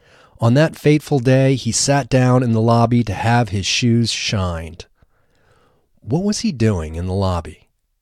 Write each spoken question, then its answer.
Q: What was he doing in the lobby?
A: He was sitting down in the lobby to have his shoes shined.